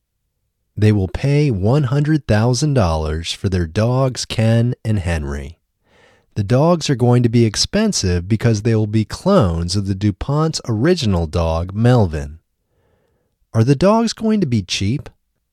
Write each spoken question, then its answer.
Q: Are the dogs going to be cheap?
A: No, the dogs aren't going to be cheap.